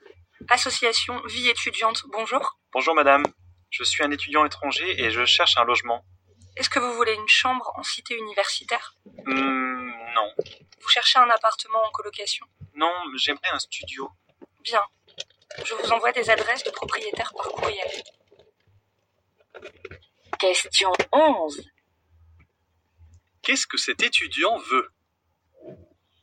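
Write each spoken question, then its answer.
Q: Qu'est-ce que cet étudiant veut?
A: Un studio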